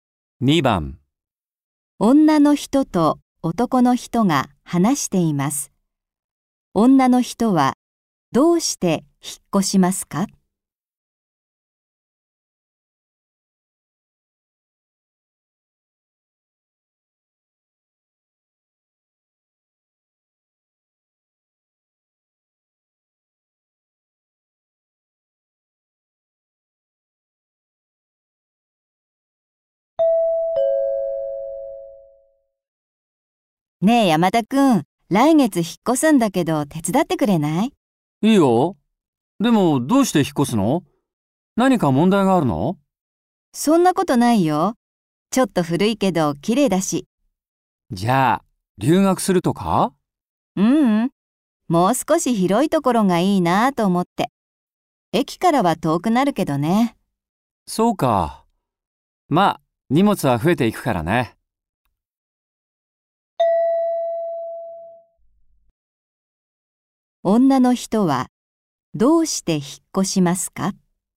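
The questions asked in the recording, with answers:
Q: 女の人はどうして引っ越しますか?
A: もう少し広いところに住みたいから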